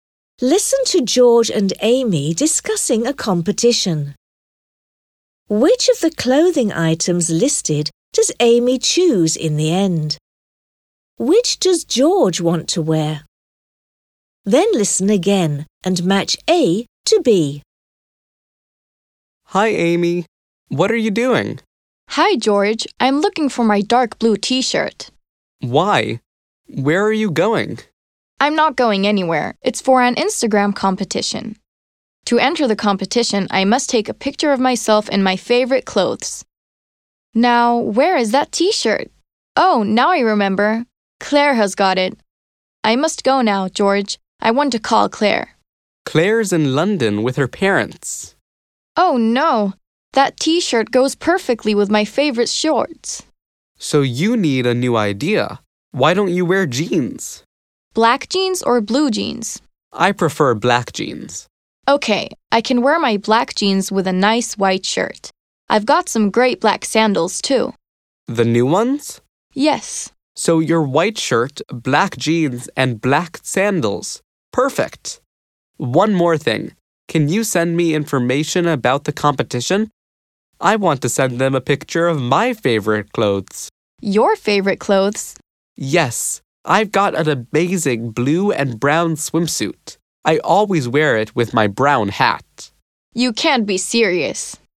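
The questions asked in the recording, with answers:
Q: Which of the clothing items listed does Amy choose in the end?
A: A white shirt, black jeans and black sandals

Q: Which does George want to wear?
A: His blue and brown swimsuit with his brown hat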